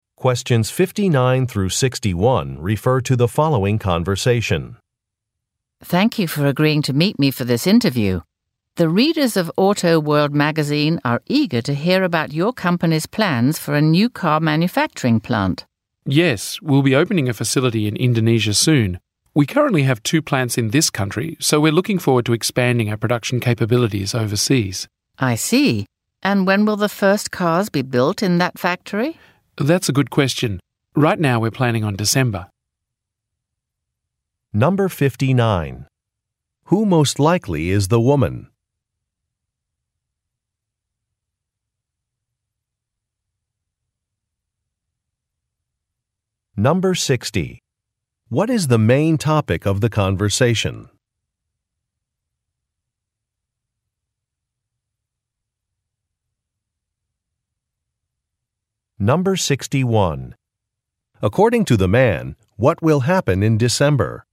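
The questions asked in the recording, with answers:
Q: What is the main topic of the conversation?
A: A new car manufacturing plant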